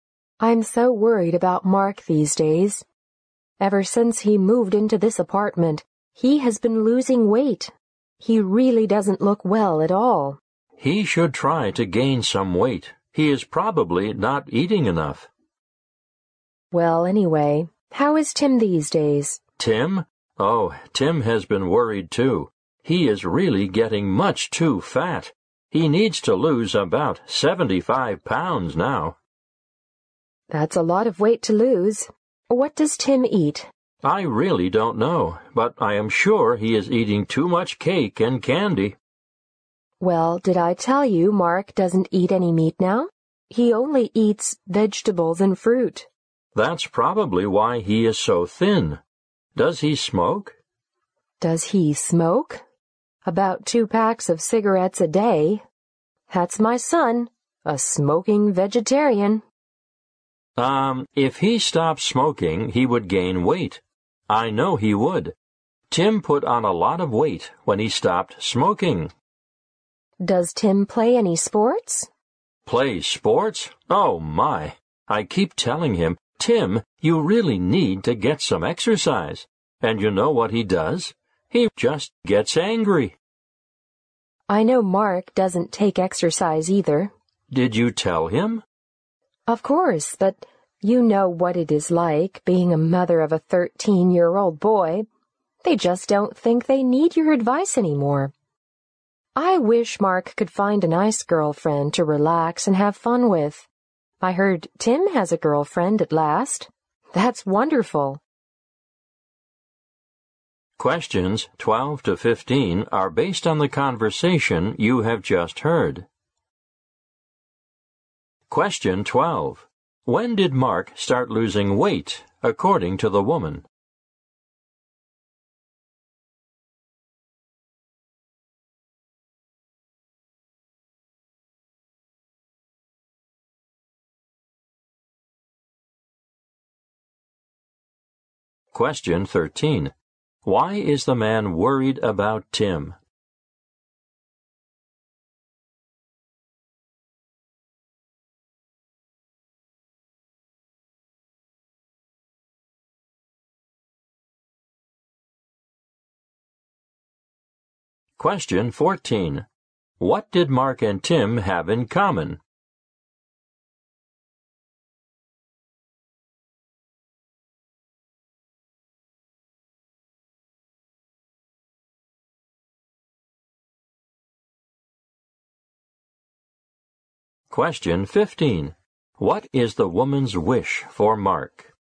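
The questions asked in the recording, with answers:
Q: When did Mark start losing weight, according to the woman?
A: Ever since he moved into his apartment

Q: Why is the man worried about Tim?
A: Tim is much too fat

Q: What did Mark and Tim have in common?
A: Neither of them takes any exercise

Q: What is the woman's wish for Mark?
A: That he finds a nice girlfriend to relax and have fun with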